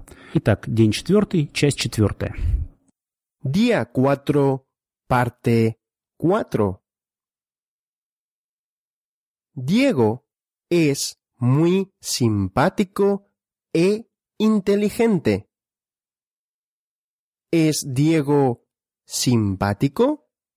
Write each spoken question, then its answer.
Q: ¿Es Diego simpático?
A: Sí, Diego es simpático.